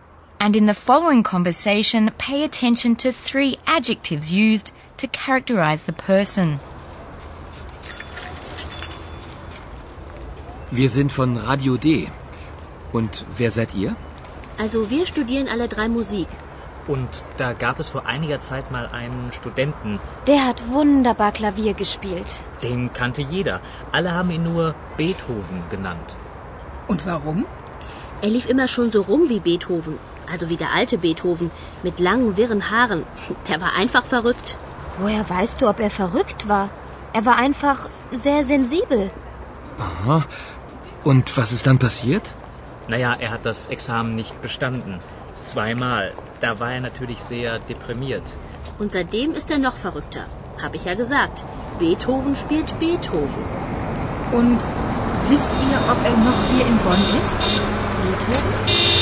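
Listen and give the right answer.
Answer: verrückt (mad), sensibel (sensitive), deprimiert (depressed)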